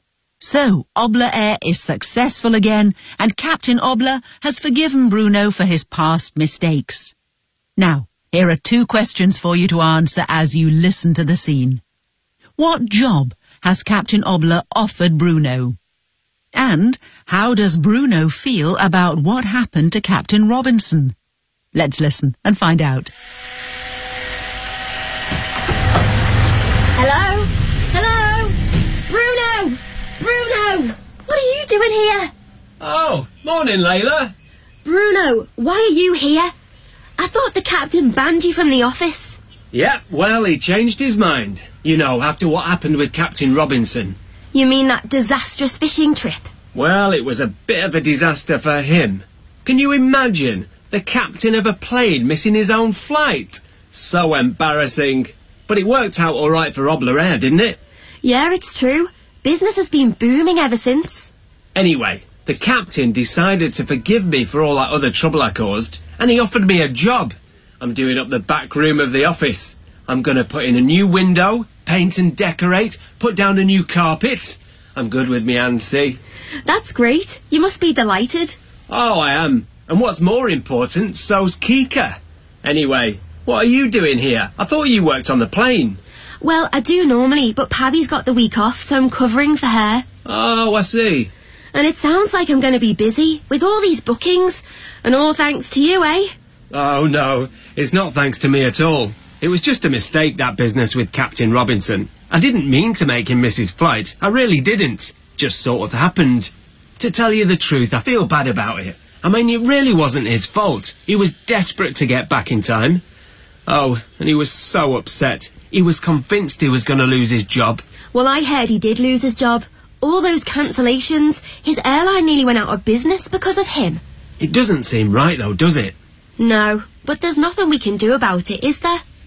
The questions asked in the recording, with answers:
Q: What job has Captain Obla offered Bruno?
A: I'm doing up the back room of the office.

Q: And how does Bruno feel about what happened to Captain Robinson?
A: To tell you the truth, I feel bad about it.